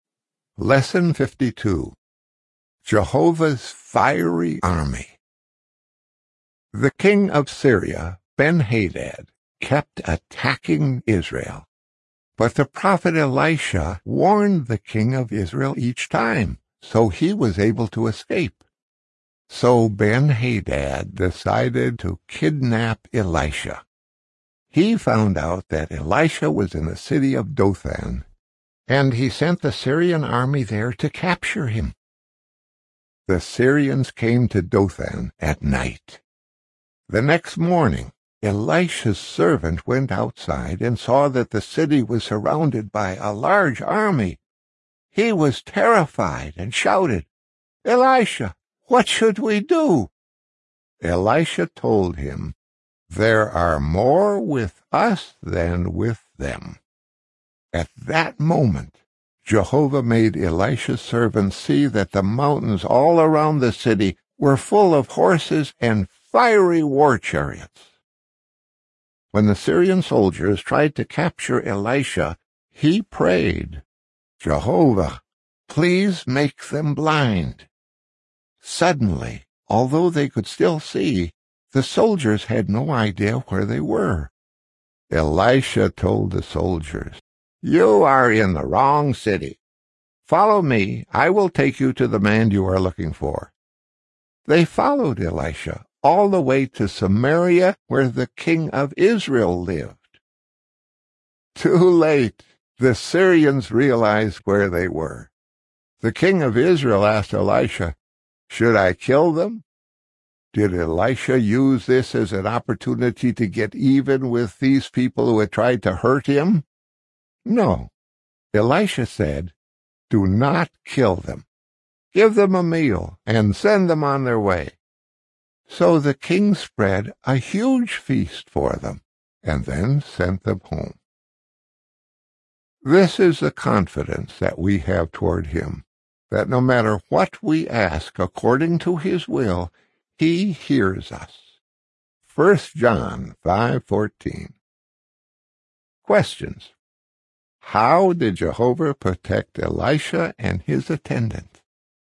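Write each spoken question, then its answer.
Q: How did Jehovah protect Elisha and his attendant?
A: He surrounded them with an army of horses and fiery war chariots, and made the Syrian soldiers blind so they didn't know where they were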